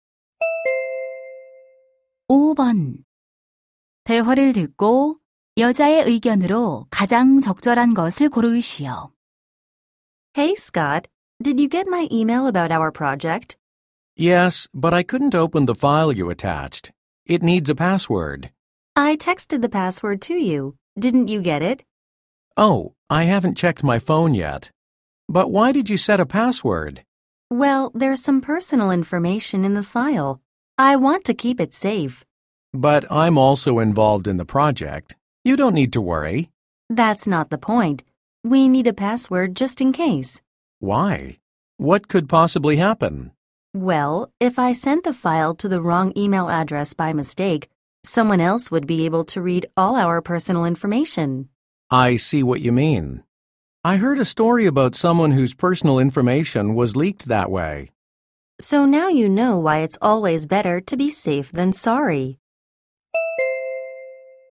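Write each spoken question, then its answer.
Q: 대화를 듣고 여자의 의견으로 가장 적절한 것을 고르시오.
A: 개인 정보가 담긴 파일에는 만일을 대비해 비밀번호를 설정해야 한다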